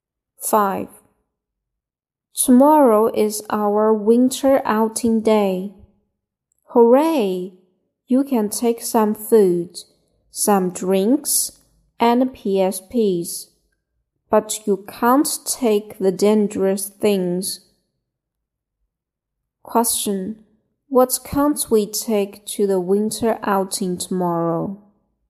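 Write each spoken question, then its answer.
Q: What can't we take to the winter outing tomorrow?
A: Dangerous things.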